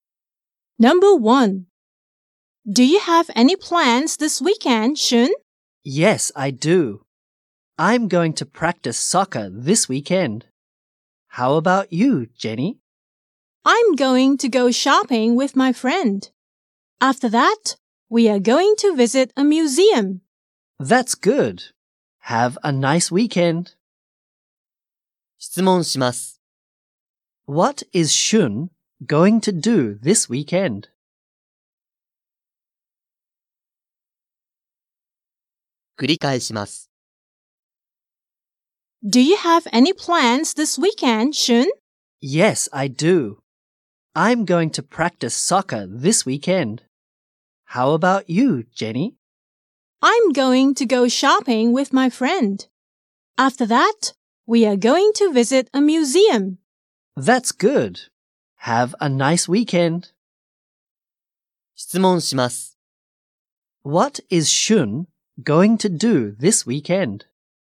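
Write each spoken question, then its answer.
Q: What is Shun going to do this weekend?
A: He is going to practice soccer.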